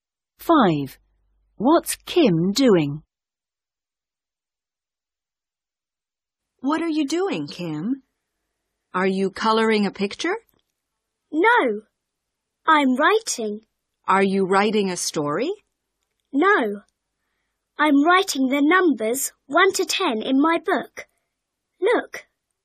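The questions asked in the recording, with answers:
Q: What's Kim doing?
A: writing the numbers 1 to 10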